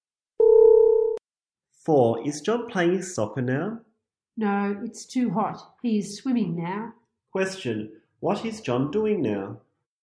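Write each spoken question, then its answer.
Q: Question, what is John doing now?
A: He is swimming.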